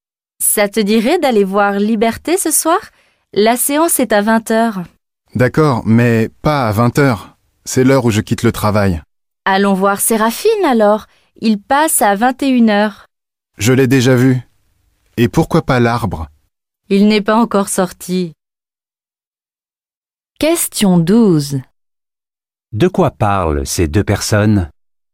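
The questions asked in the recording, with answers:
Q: De quoi parlent ces deux personnes?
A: D'aller au cinéma ce soir (choisir un film et une séance)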